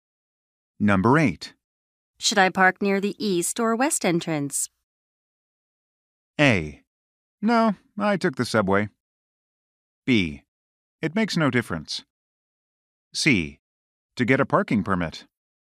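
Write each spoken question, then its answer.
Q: Should I park near the east or west entrance?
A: B: It makes no difference.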